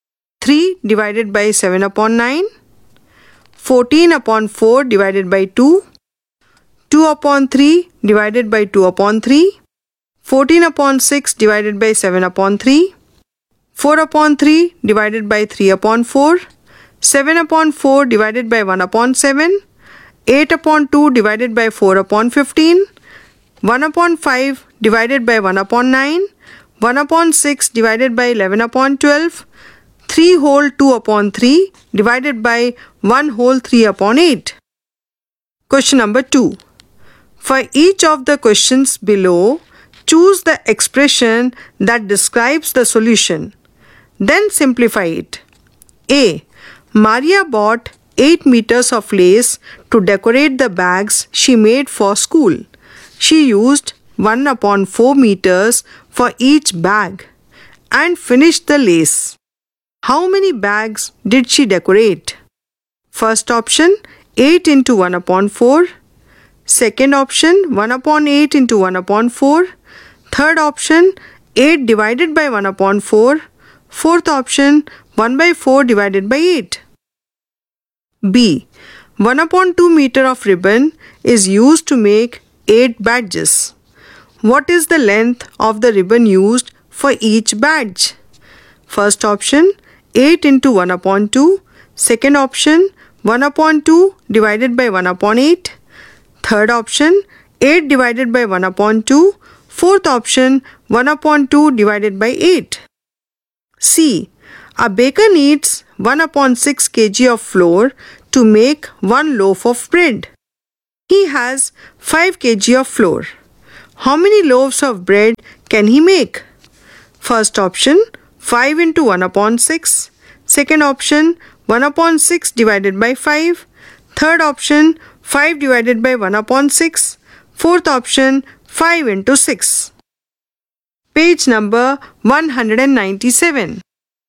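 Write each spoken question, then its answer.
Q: How many bags did she decorate?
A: Third option: 8 divided by 1 upon 4 (32 bags)

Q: What is the length of the ribbon used for each badge?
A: Fourth option: 1 upon 2 divided by 8 (1/16 m)

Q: He has 5 kg of flour. How many loaves of bread can he make?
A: Third option: 5 divided by 1 upon 6 (30 loaves)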